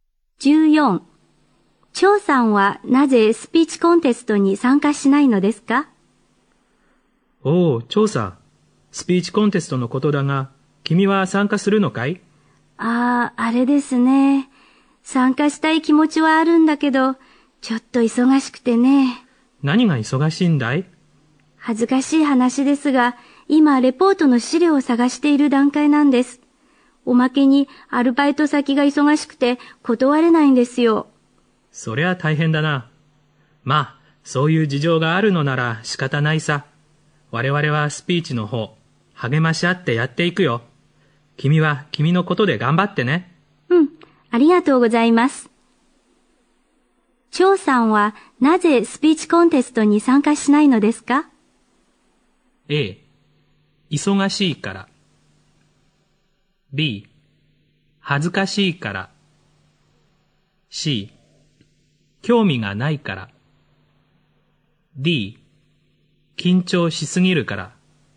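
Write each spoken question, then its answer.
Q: 張さんはなぜスピーチコンテストに参加しないのですか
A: A: 忙しいから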